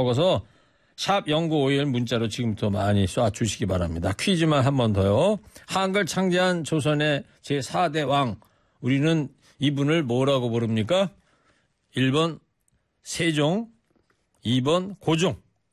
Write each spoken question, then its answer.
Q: 우리는 이분을 뭐라고 부릅니까? 1번 세종, 2번 고종.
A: 모르시면 몇 번? 1번.